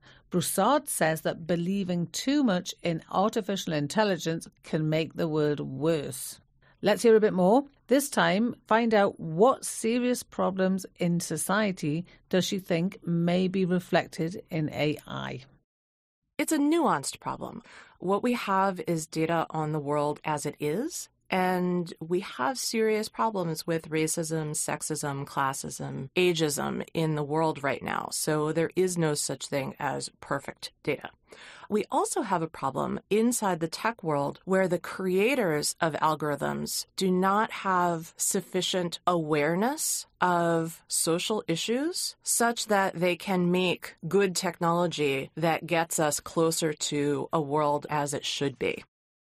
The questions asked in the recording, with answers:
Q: find out what serious problems in society does she think may be reflected in AI.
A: She said that society has problems with racism, sexism, classism, and ageism.